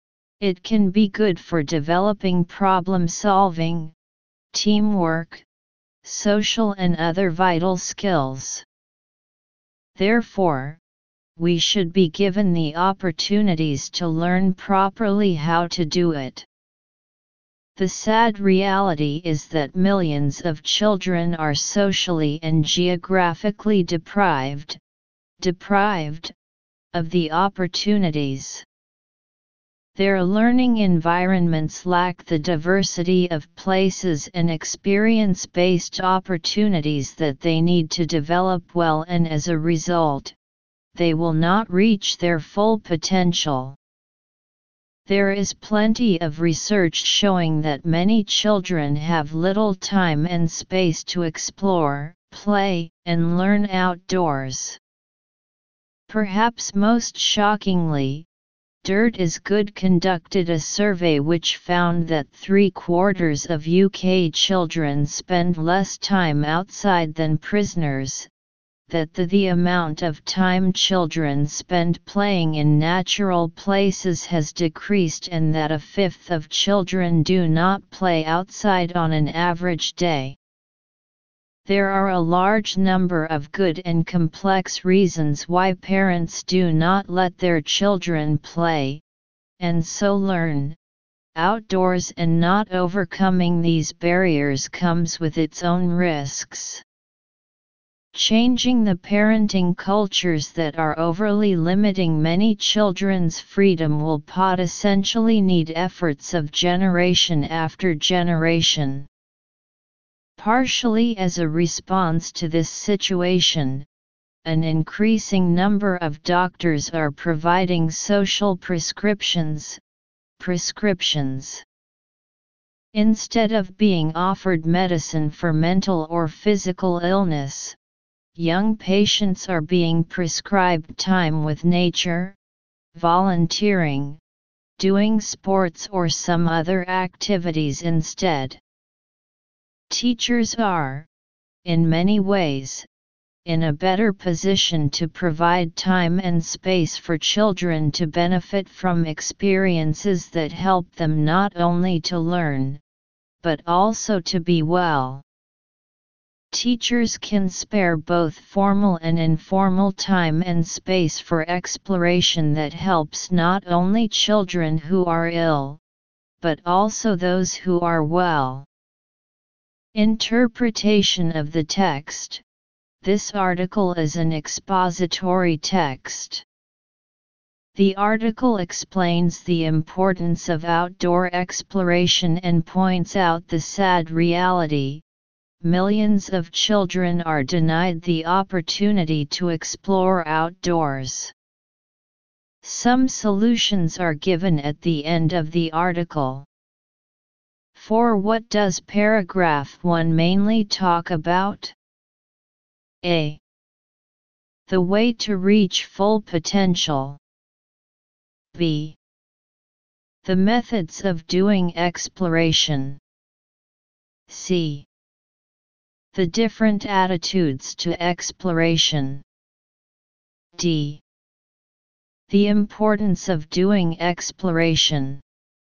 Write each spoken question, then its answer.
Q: For what does paragraph 1 mainly talk about?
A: the first paragraph is telling us the importance of outdoor exploration.